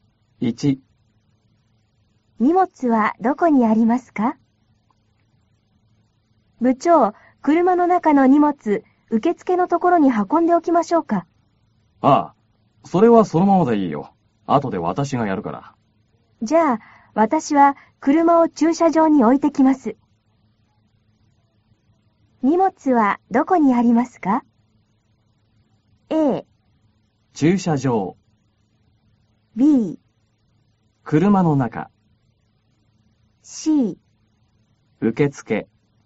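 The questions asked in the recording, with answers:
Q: 荷物はどこにありますか?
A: B: 車の中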